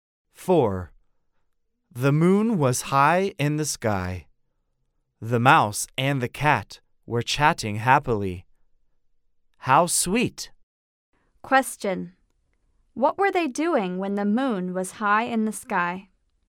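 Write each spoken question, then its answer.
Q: What were they doing when the moon was high in the sky?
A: They were chatting happily.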